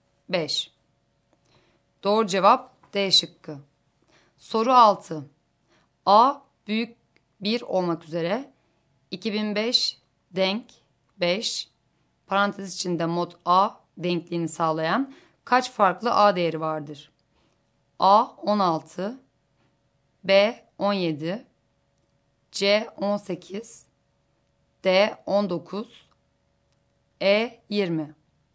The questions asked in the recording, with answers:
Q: A büyük 1 olmak üzere 2005 denk 5 parantez içinde mod A denkliğini sağlayan kaç farklı A değeri vardır?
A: Doğru cevap D şıkkı.